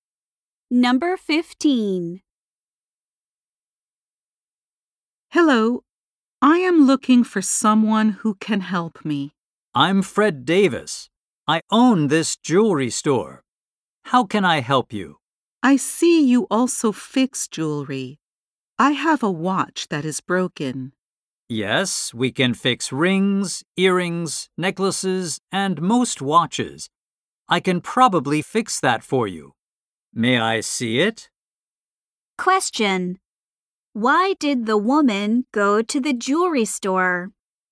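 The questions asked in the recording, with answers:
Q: Why did the woman go to the jewelry store?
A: To get her broken watch fixed.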